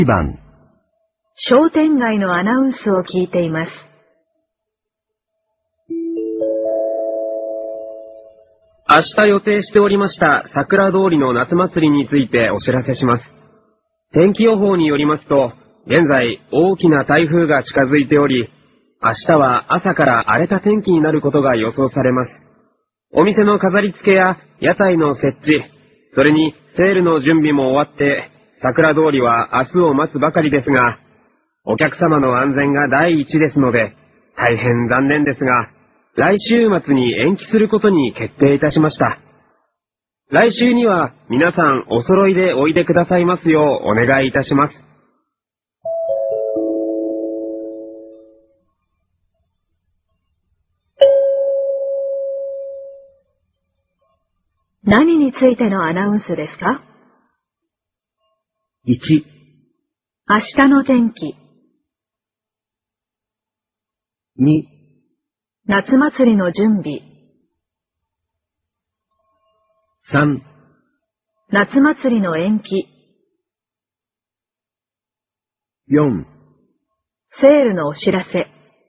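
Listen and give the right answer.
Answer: 3: 夏祭りの延期。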